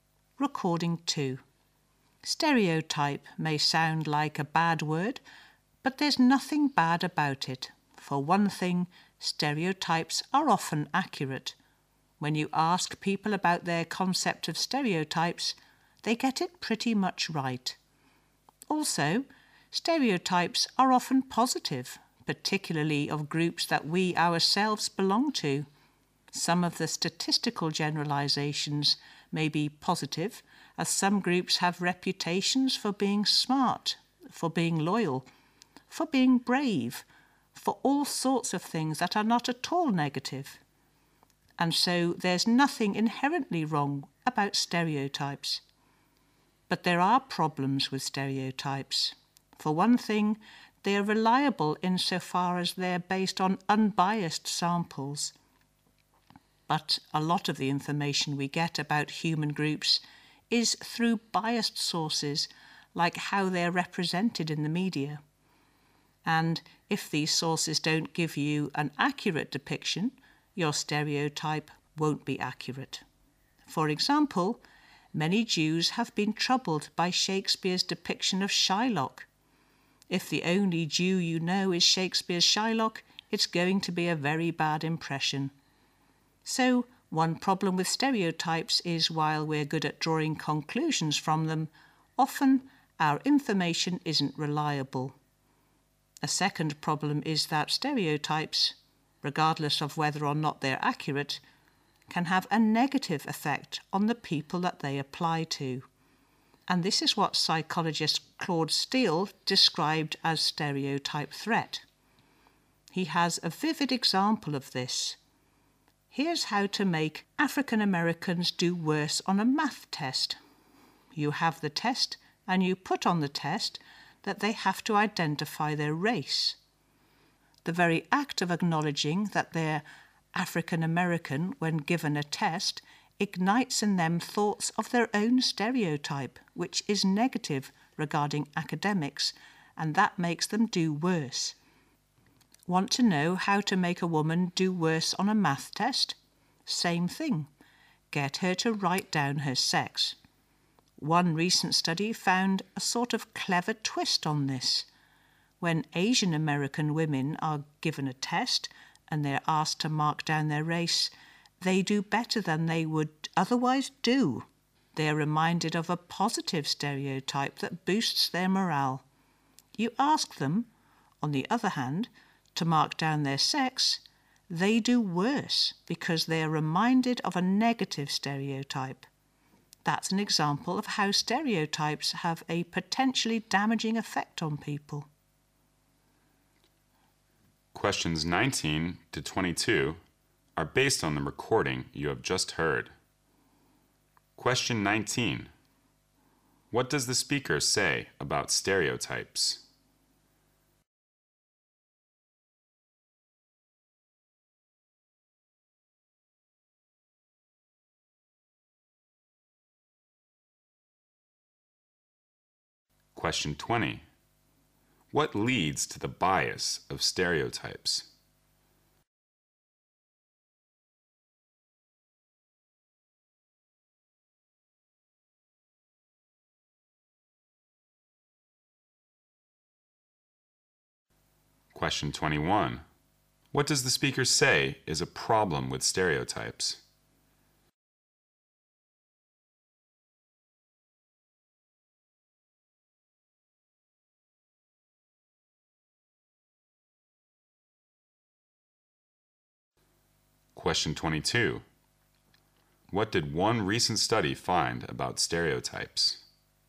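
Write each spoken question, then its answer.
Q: What leads to the bias of stereotypes?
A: Information from biased sources, such as the media

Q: What did one recent study find about stereotypes?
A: Asian American women did better when asked to mark their race and worse when asked to mark their sex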